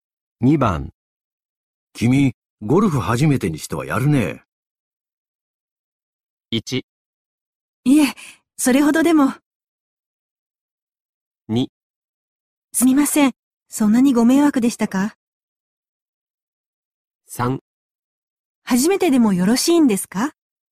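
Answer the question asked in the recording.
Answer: 1: いえ、それほどでも。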